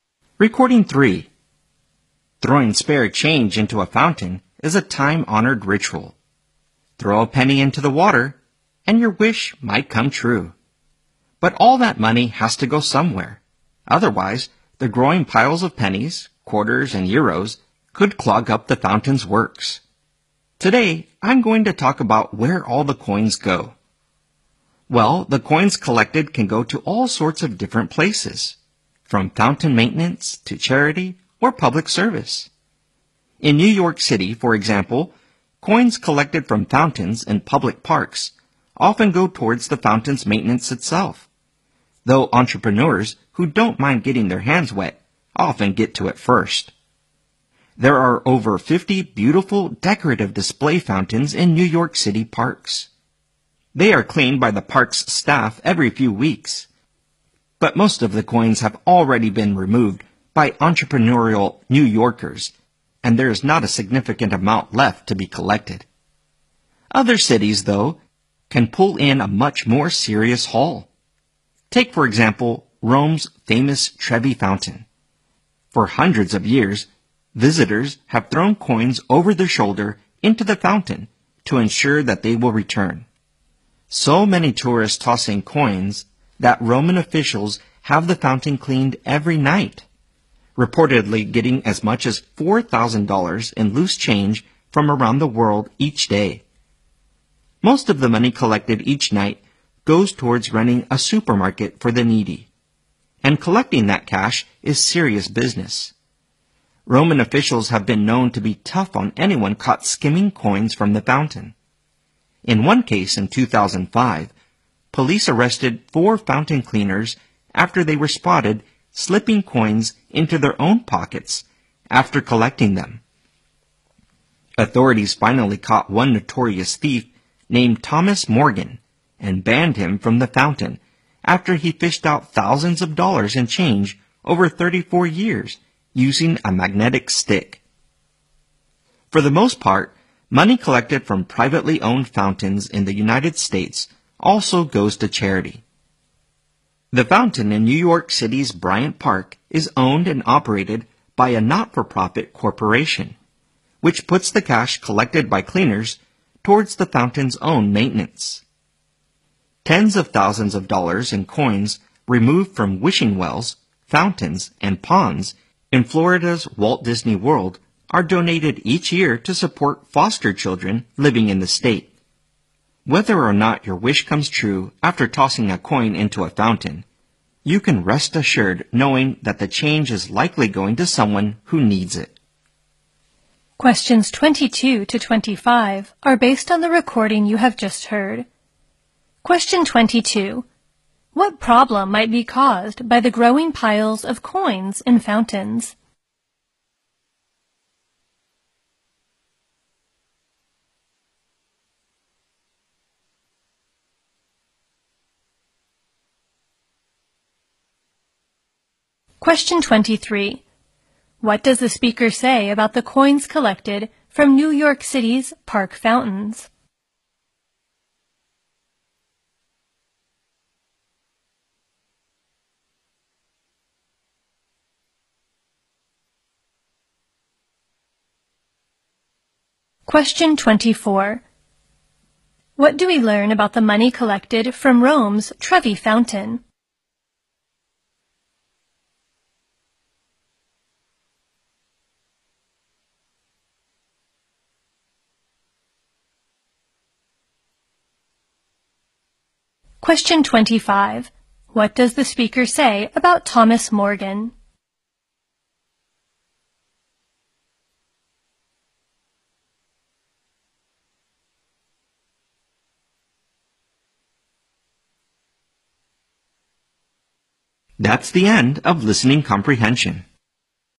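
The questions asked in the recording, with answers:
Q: What problem might be caused by the growing piles of coins in fountains?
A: They could clog up the fountain's works.

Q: What does the speaker say about the coins collected from New York City's park fountains?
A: They often go toward maintaining the fountains, though people take most of the coins first.

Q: What do we learn about the money collected from Rome's Trevi Fountain?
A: Most of it goes toward running a supermarket for the needy.

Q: What does the speaker say about Thomas Morgan?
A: He took thousands of dollars from the fountain over 34 years with a magnetic stick and was banned.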